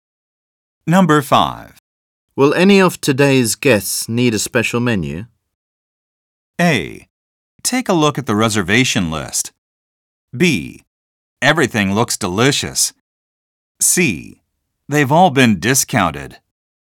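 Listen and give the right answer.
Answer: A: Take a look at the reservation list.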